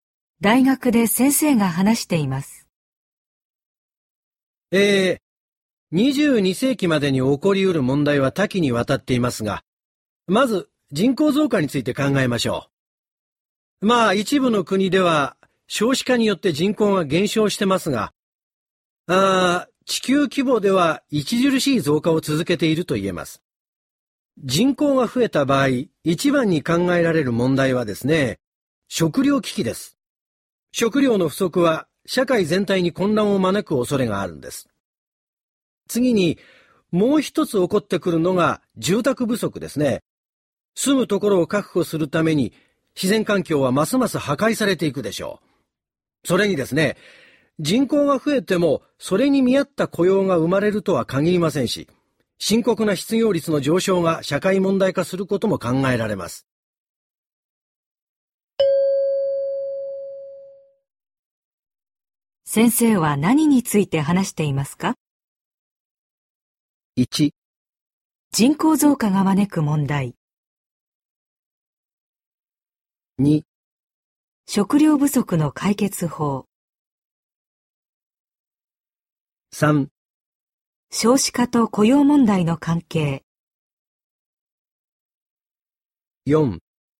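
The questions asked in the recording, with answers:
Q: 先生は何について話していますか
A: 1: 人口増加が招く問題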